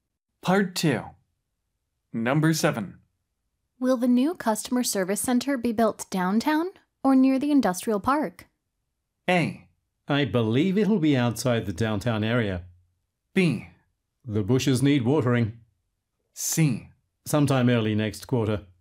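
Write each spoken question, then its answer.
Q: Will the new customer service center be built downtown or near the industrial park?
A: A: I believe it'll be outside the downtown area.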